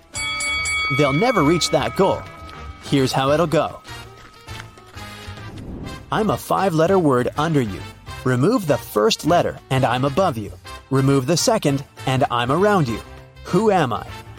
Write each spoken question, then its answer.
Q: Who am I?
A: It's a chair.